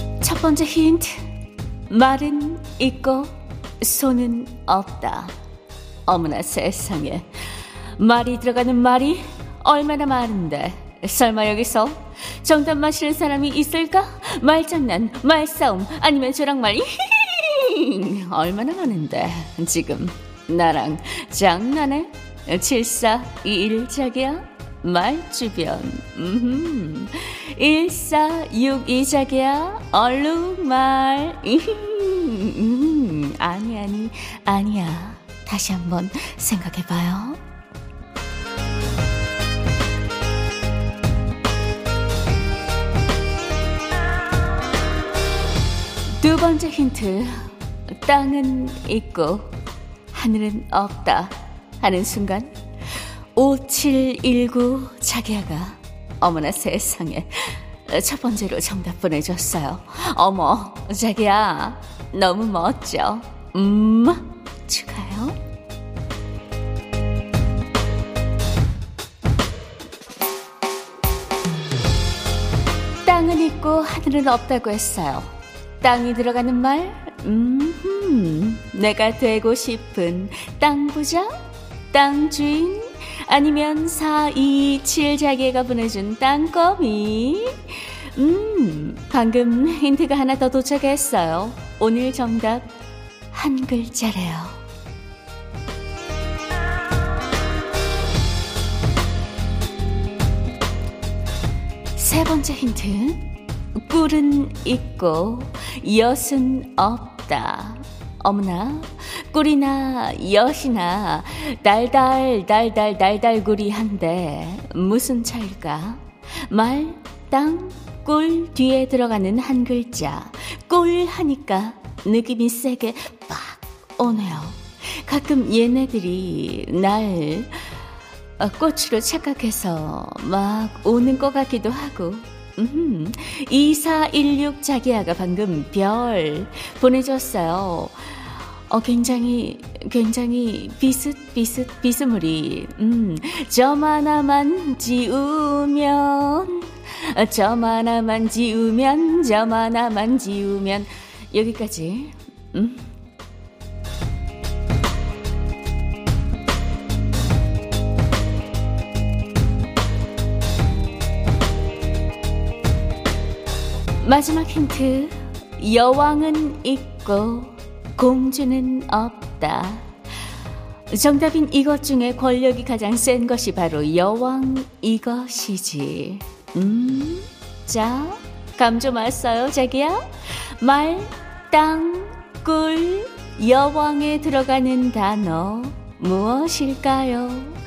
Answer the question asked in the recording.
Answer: 정답은 벌.